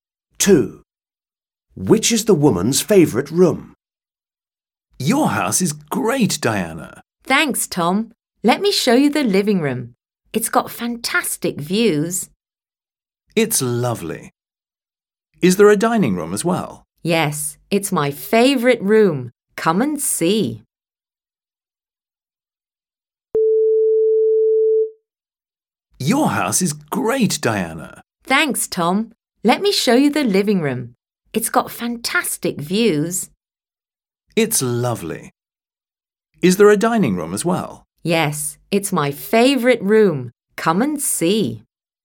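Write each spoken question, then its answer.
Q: Which is the woman's favourite room?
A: the dining room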